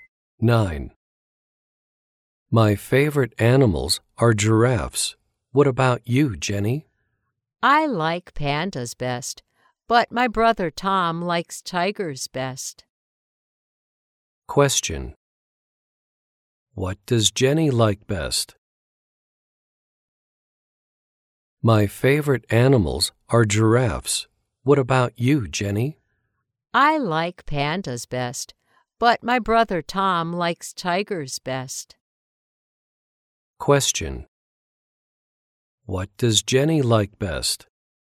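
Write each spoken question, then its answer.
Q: What does Jenny like best?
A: Pandas.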